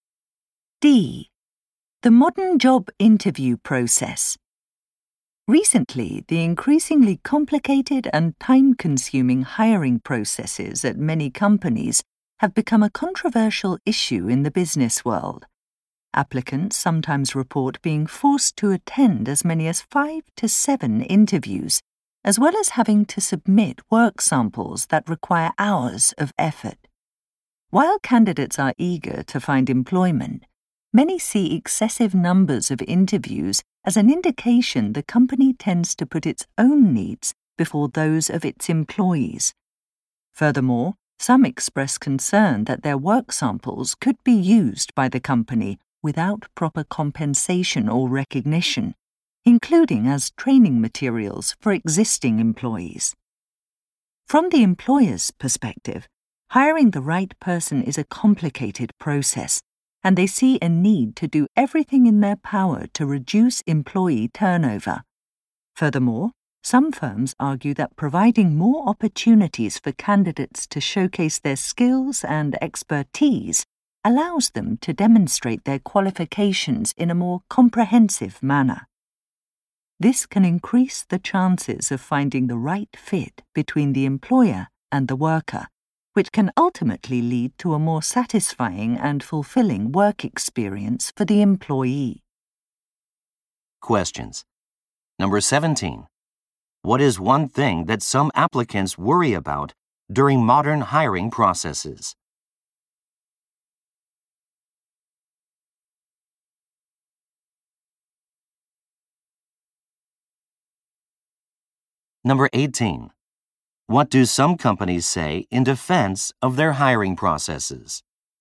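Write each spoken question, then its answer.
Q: What is one thing that some applicants worry about during modern hiring processes?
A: Their work samples could be used by the company without proper pay or credit.

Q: What do some companies say in defense of their hiring processes?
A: The processes give candidates more chances to show their skills, which leads to a better fit.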